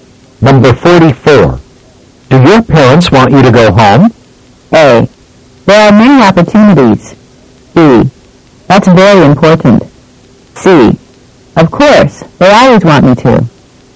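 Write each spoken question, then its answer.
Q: Do your parents want you to go home?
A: C: Of course, they always want me to.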